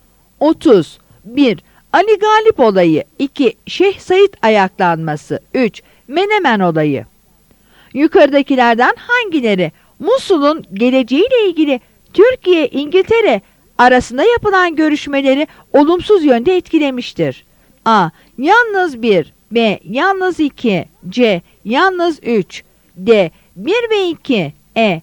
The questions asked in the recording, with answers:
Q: Yukarıdakilerden hangileri Musul'un geleceğiyle ilgili Türkiye-İngiltere arasında yapılan görüşmeleri olumsuz yönde etkilemiştir?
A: Yanıt B'dir.